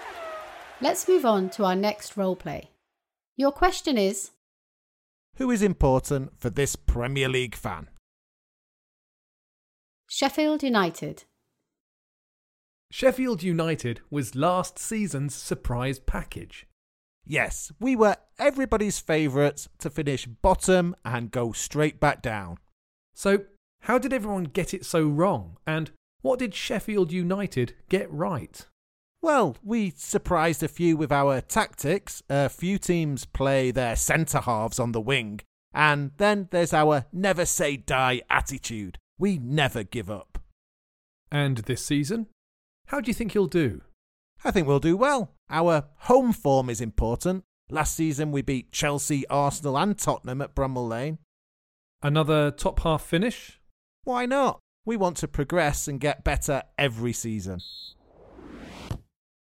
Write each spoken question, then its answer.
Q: who is important for this Premier League fan?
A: He said his club's home form is important.